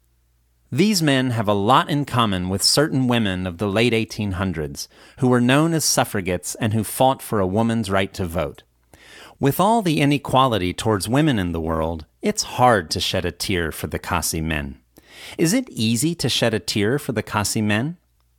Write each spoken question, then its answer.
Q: Is it easy to shed a tear for the Khasi men?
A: No, it isn't. It's hard to shed a tear for the Khasi men.